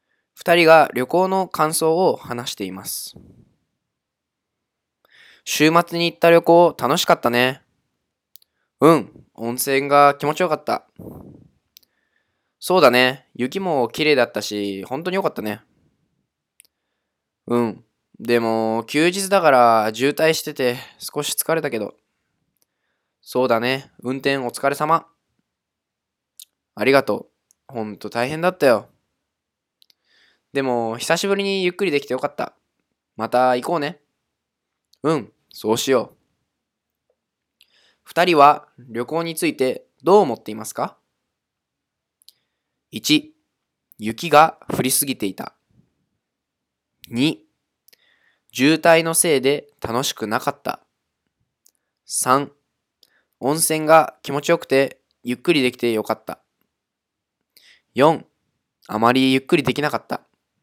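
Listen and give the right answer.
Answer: 3: 温泉が気持ちよくてゆっくりできてよかった。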